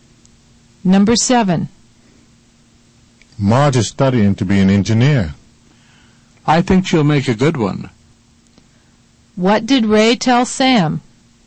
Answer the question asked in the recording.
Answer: He told Sam that Marge was studying to be an engineer.